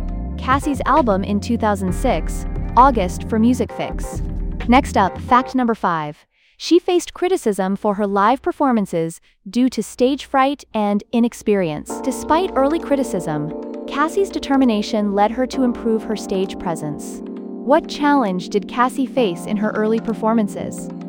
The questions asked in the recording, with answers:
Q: What challenge did Cassie face in her early performances?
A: Correct answer, stage fright and inexperience.